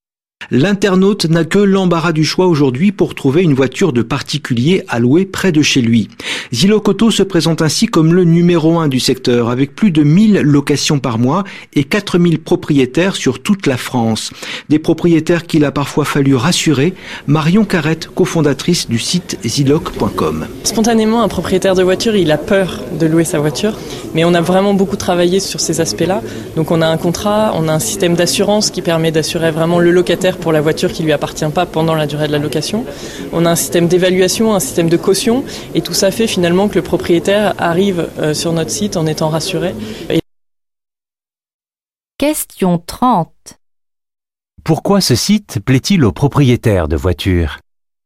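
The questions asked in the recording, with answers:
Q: Pourquoi ce site plaît-il aux propriétaires de voitures ?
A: Parce qu'il les rassure : contrat, assurance du locataire, système d'évaluation et caution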